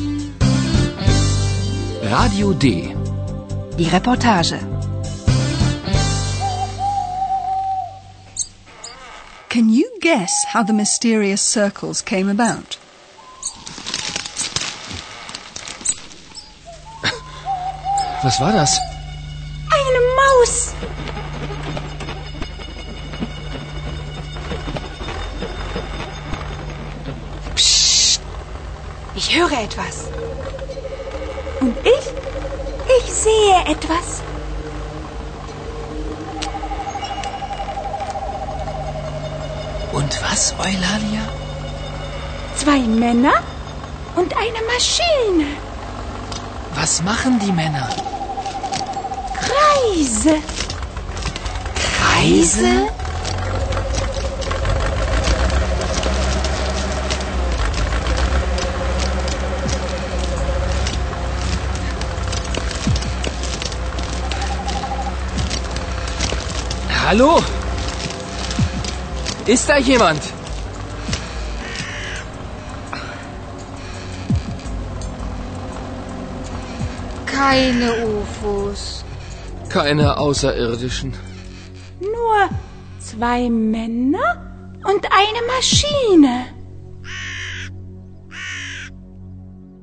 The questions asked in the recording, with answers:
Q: Can you guess how the mysterious circles came about?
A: Two men, farmers from the village probably, have cut circles into the corn with a harvesting machine.